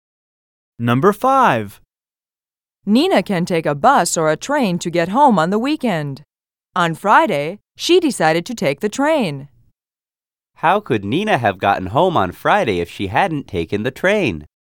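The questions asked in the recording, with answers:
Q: How could Nina have gotten home on Friday if she hadn't taken the train?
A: She could have taken a bus.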